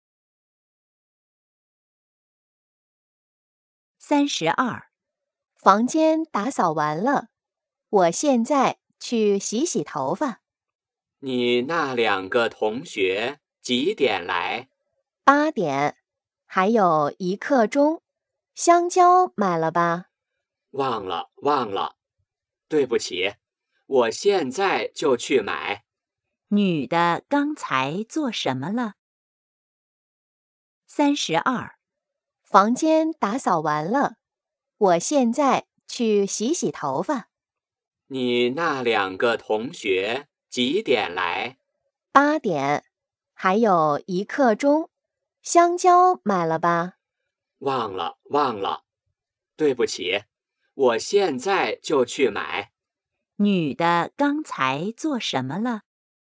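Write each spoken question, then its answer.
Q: 女的刚才做什么了?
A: 打扫房间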